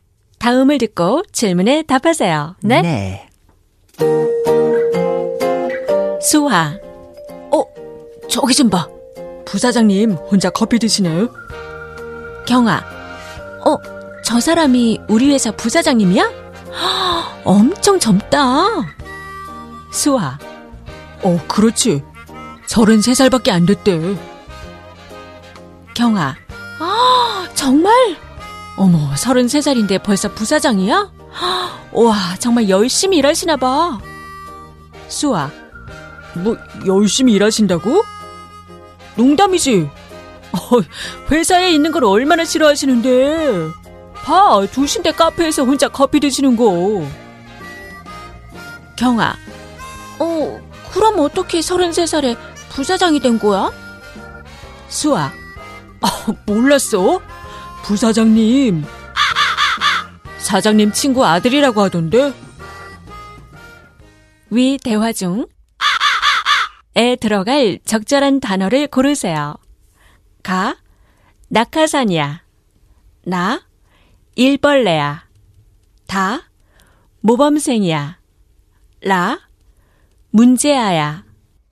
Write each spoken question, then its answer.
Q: 위 대화 중에 들어갈 적절한 단어를 고르세요.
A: Which means ka is the answer.